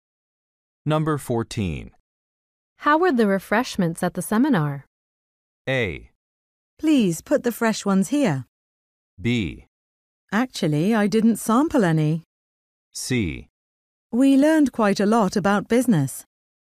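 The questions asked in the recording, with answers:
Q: How were the refreshments at the seminar?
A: B: Actually, I didn't sample any.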